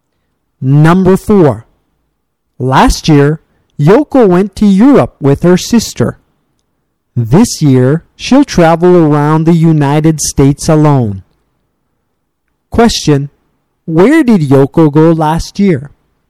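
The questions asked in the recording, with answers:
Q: Where did Yoko go last year?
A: To Europe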